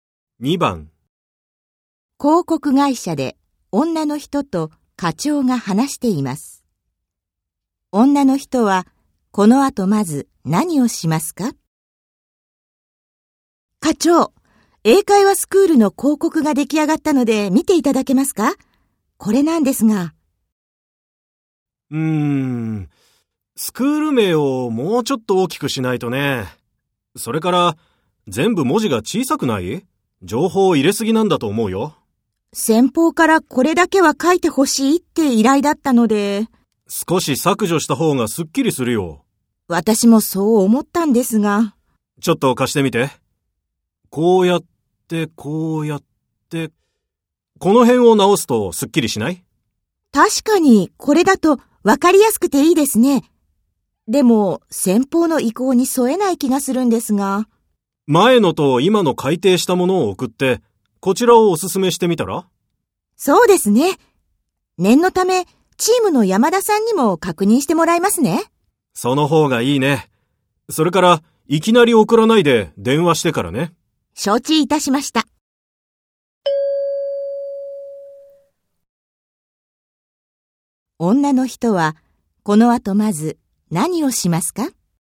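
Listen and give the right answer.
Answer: チームの山田さんに広告を確認してもらう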